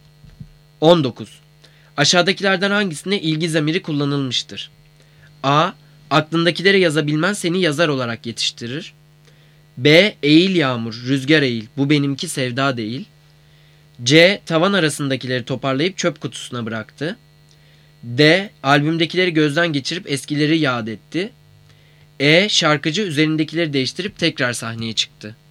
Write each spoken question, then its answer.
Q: Aşağıdakilerden hangisinde ilgi zamiri kullanılmıştır?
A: Cevap B. Eğil yağmur, rüzgar eğil, bu benimki sevda değil.